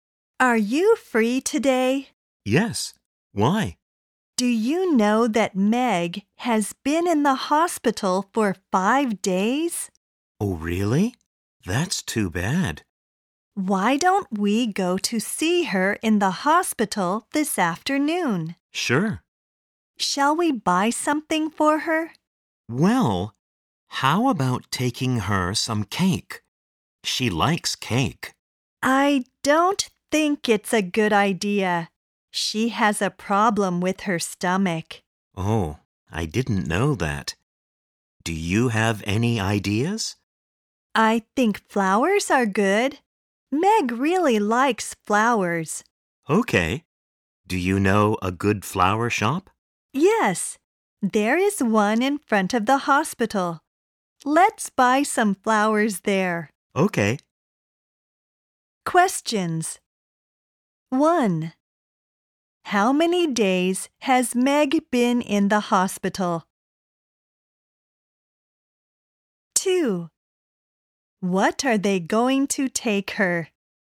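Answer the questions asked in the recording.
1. 5 days
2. Flowers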